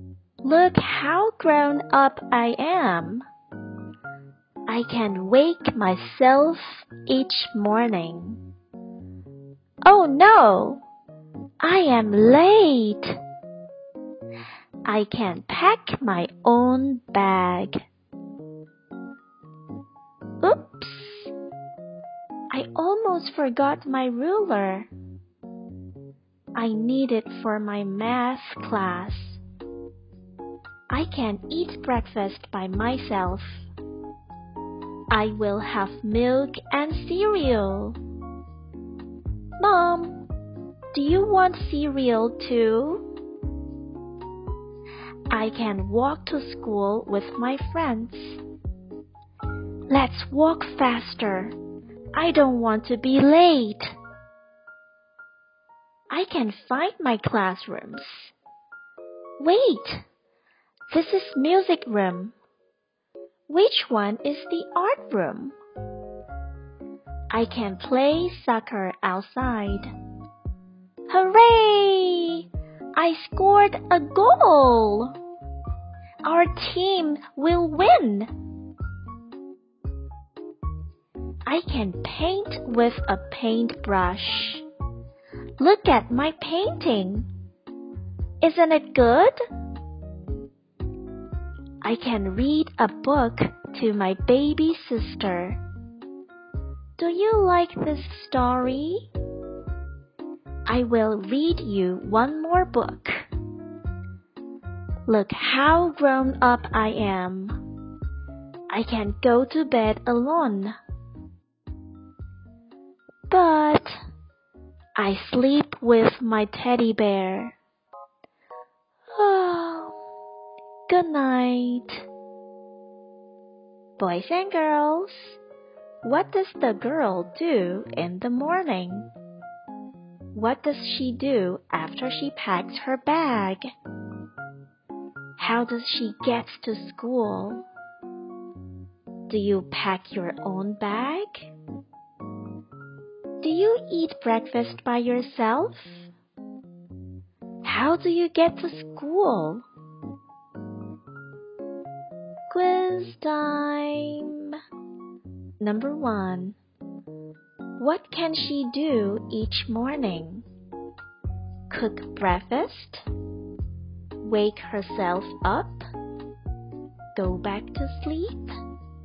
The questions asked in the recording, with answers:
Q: What can she do each morning?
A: The answer is she can wake herself up.